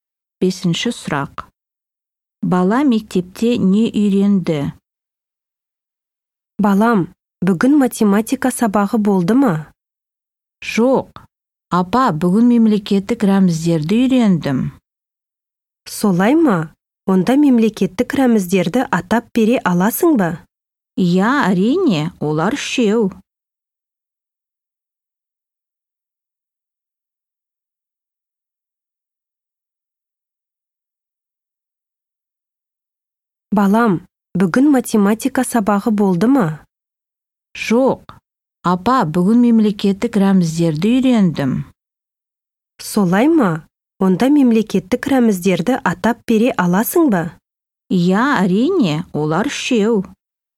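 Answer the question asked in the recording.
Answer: Мемлекеттік рәміздерді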